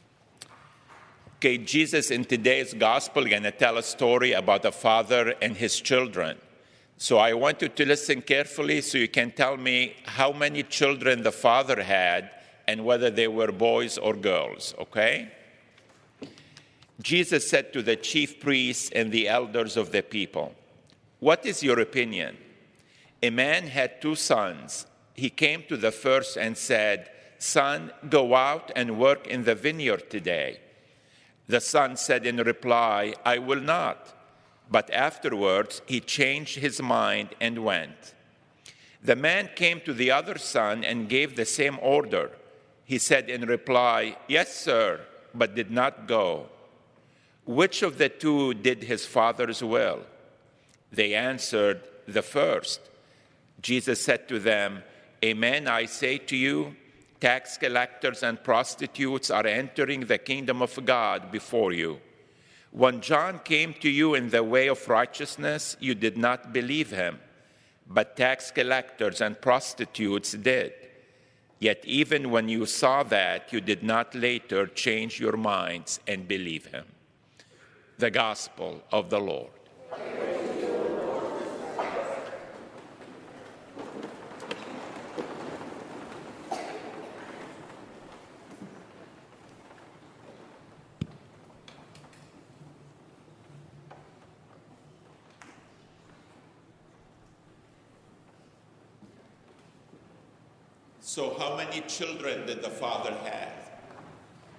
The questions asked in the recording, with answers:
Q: So how many children did the father have?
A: Two.